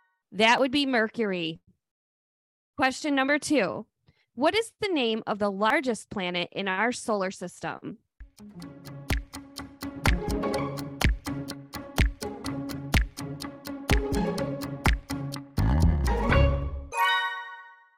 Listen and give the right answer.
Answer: The largest planet is Jupiter.